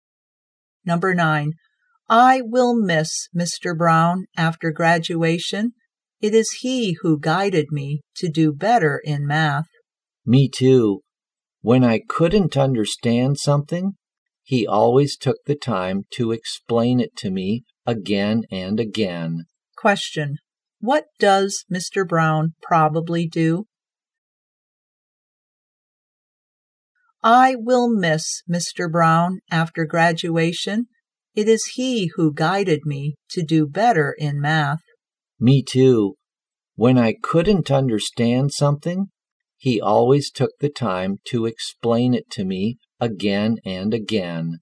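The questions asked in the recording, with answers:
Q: what does Mr. Brown probably do?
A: He is a math teacher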